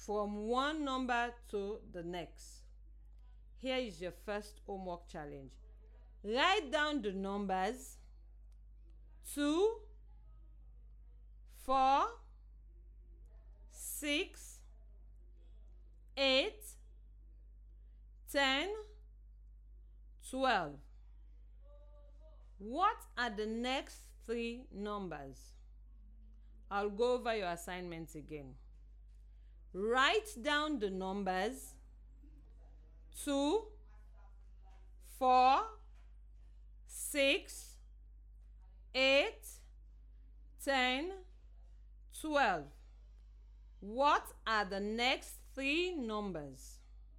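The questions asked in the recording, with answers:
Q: 2, 4, 6, 8, 10, 12. What are the next three numbers?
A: 14, 16, 18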